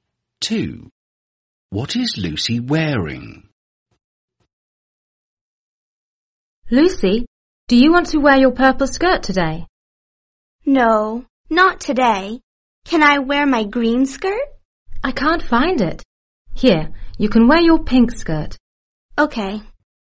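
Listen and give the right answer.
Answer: Her pink skirt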